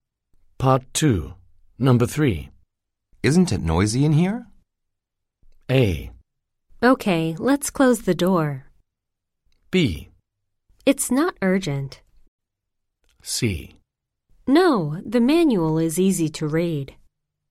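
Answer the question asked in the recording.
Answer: A: Okay, let's close the door.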